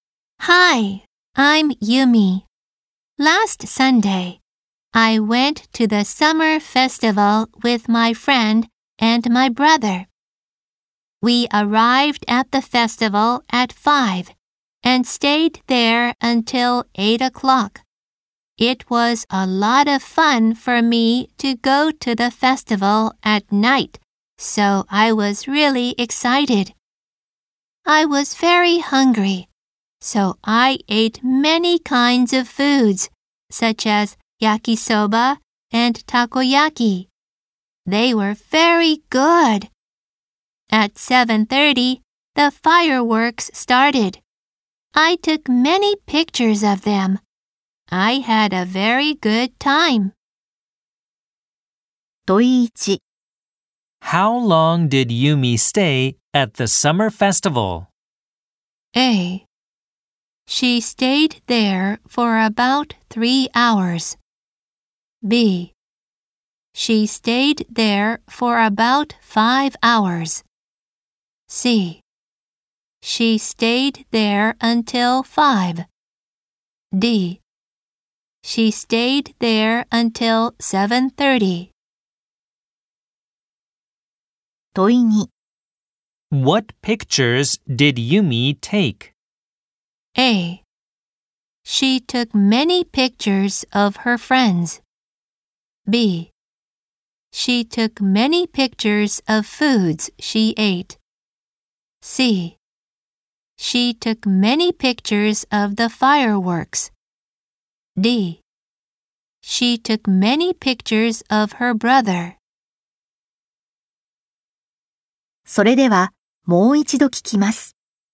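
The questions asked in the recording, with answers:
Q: How long did Yumi stay at the summer festival?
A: A: She stayed there for about 3 hours.

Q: What pictures did Yumi take?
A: C: She took many pictures of the fireworks.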